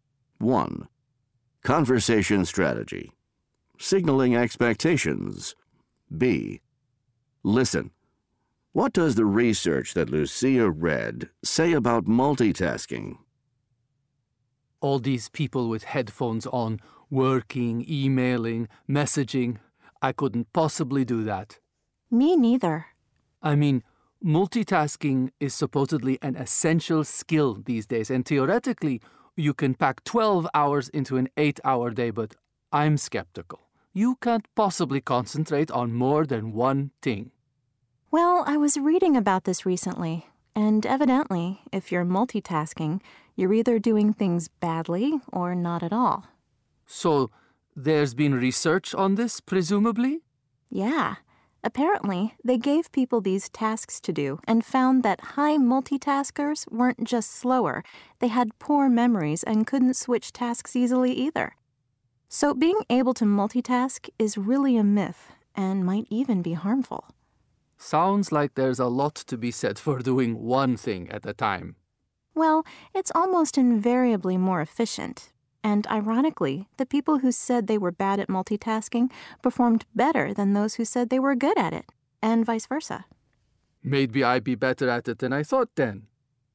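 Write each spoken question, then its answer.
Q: What does the research that Lucia read say about multitasking?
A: If you multitask you do things badly or not at all; high multitaskers were slower, had poor memories and couldn't switch tasks easily, so multitasking is a myth and may be harmful.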